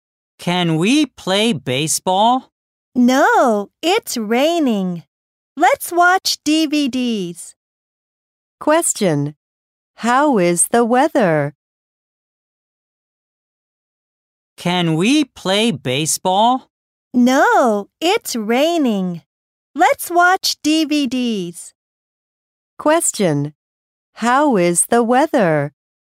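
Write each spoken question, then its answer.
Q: How is the weather?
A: It's rainy.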